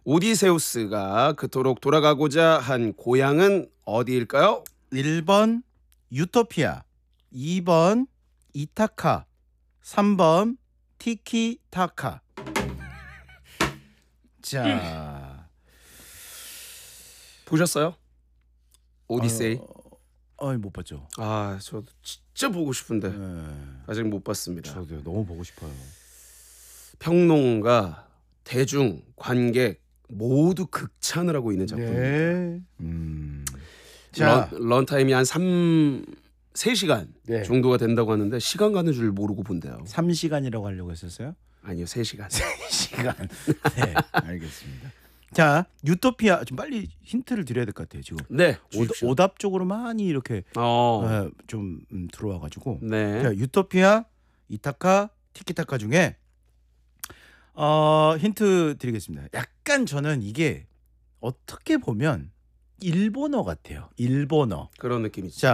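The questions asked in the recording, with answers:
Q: 오디세우스가 그토록 돌아가고자 한 고향은 어디일까요?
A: 2번: 이타카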